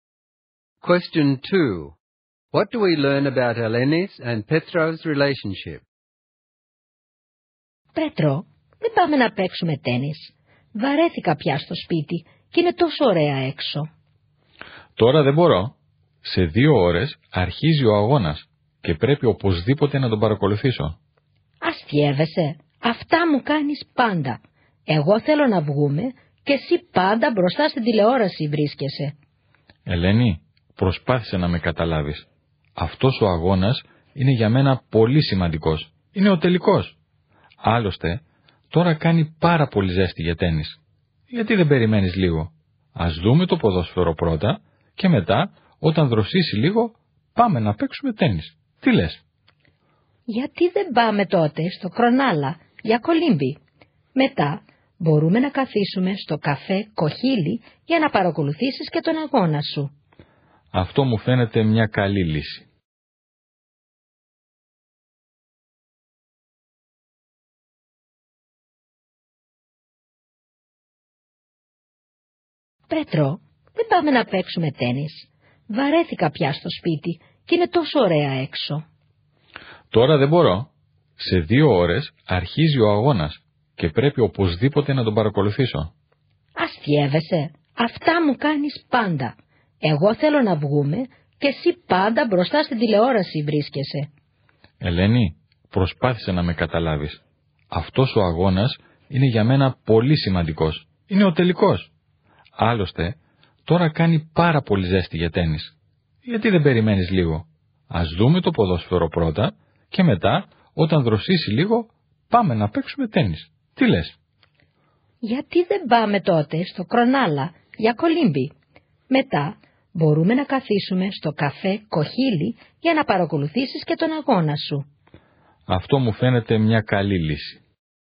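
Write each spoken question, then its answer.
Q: What do we learn about Eleni's and Petro's relationship?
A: They disagree at first: Eleni wants to go out and says Petros is always in front of the TV, while he wants to watch the final. They find a compromise, swimming at Cronulla and then watching the match at a café.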